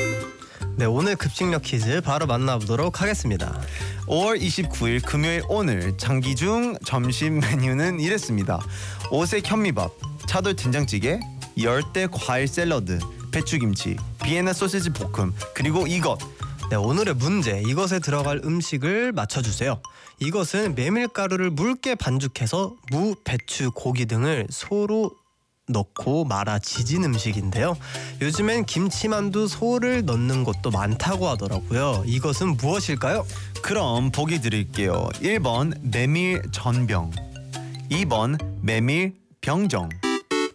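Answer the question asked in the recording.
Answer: 1: 메밀 전병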